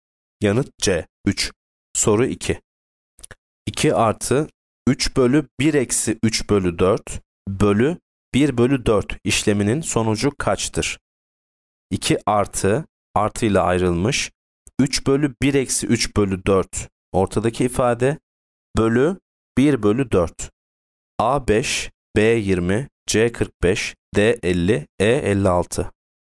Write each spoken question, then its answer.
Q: 2 artı 3 bölü 1 eksi 3 bölü 4 bölü 1 bölü 4 işleminin sonucu kaçtır?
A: Yanıt D. 50.